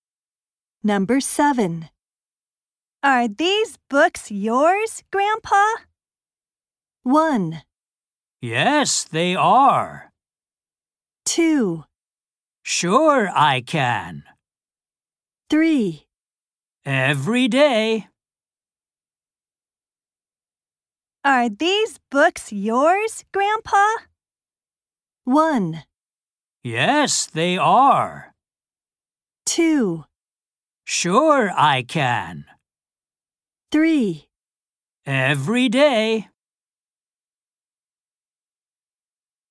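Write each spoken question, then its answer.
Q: Are these books yours, Grandpa?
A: 1: Yes, they are.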